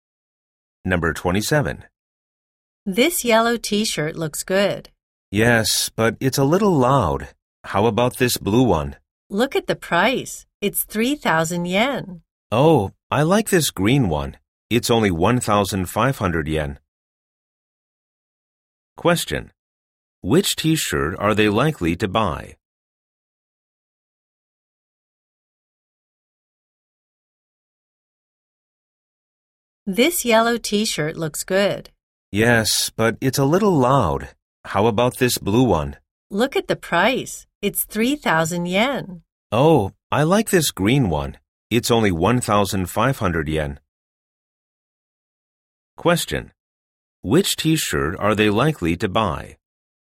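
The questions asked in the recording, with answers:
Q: Which t-shirt are they likely to buy?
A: The green one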